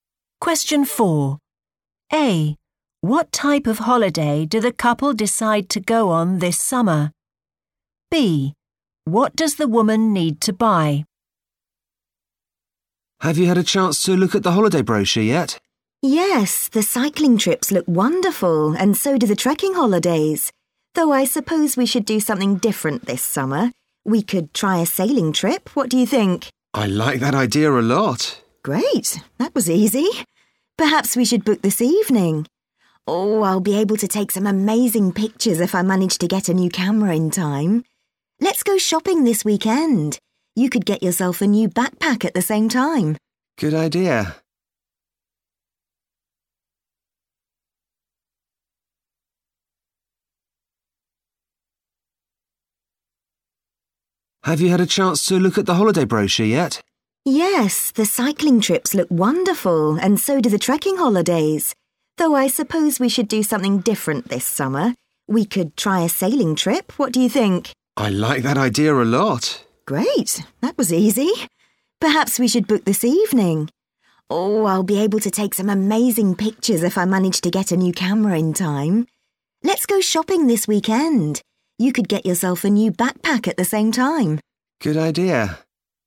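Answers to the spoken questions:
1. a sailing trip
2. a new camera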